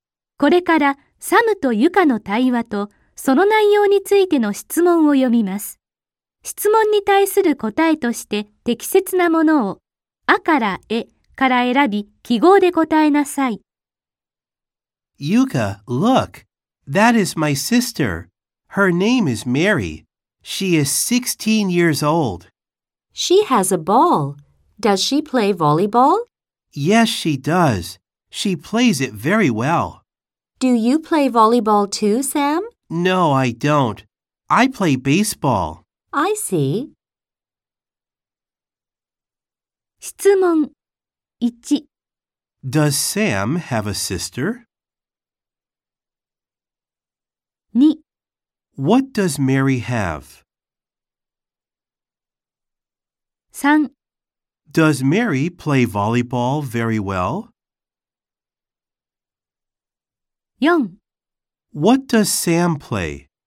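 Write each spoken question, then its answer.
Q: Does Sam have a sister?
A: Yes, he does.

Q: What does Mary have?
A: A ball.

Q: Does Mary play volleyball very well?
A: Yes, she does.

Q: What does Sam play?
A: Baseball.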